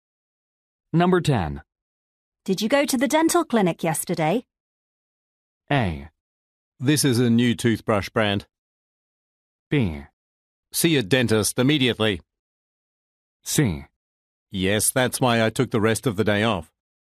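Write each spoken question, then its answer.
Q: Did you go to the dental clinic yesterday?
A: C: Yes, that's why I took the rest of the day off.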